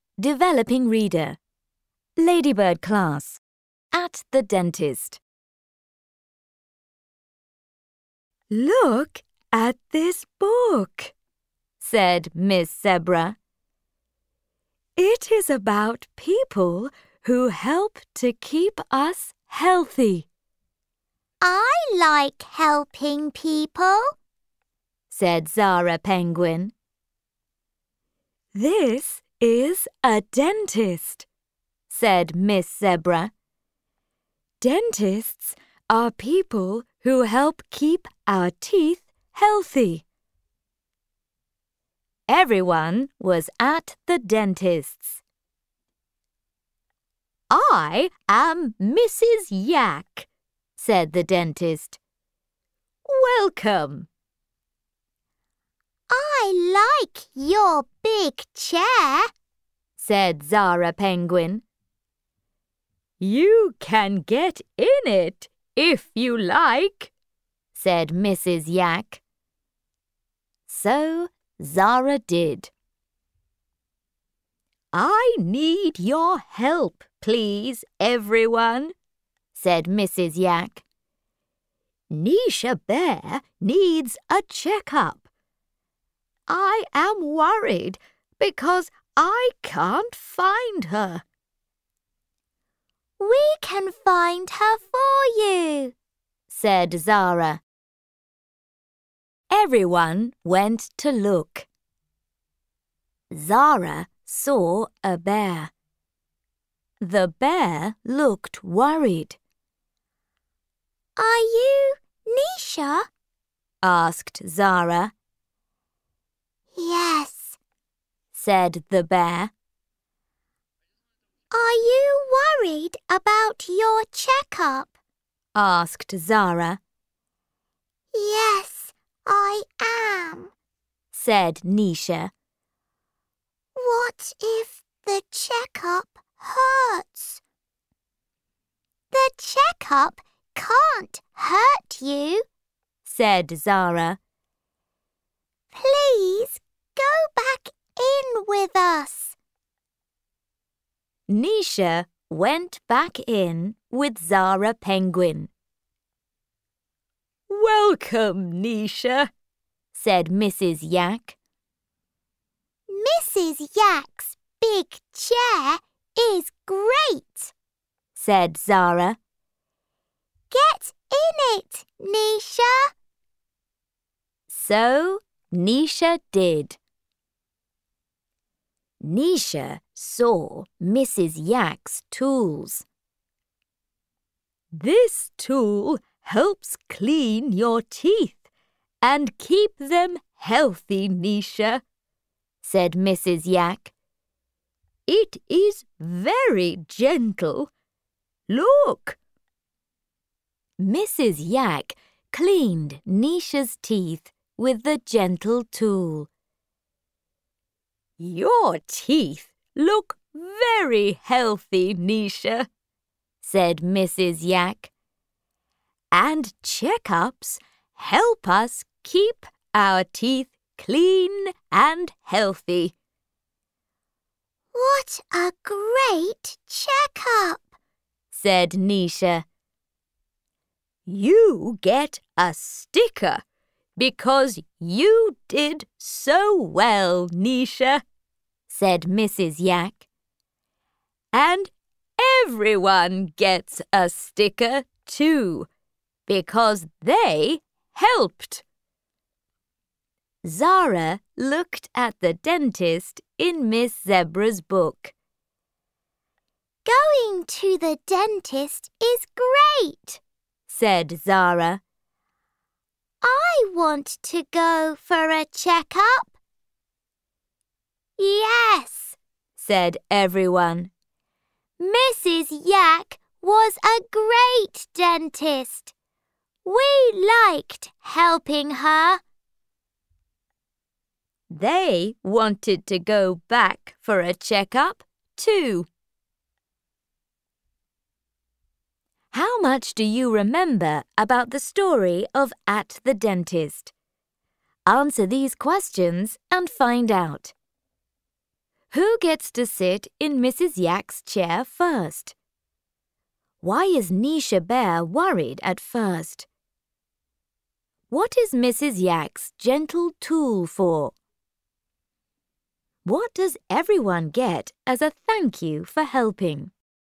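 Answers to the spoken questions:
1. Zara Penguin
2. She is worried the checkup will hurt
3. To clean teeth and keep them healthy
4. A sticker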